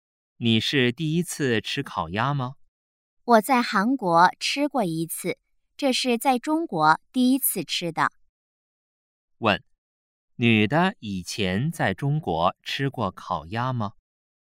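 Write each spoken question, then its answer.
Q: 女的以前在中国吃过烤鸭吗?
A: 没吃过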